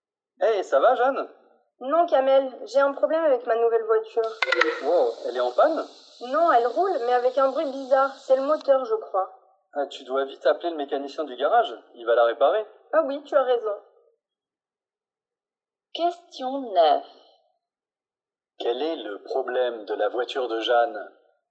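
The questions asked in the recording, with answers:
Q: Quel est le problème de la voiture de Jeanne?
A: Elle fait un bruit bizarre (le moteur, croit-elle).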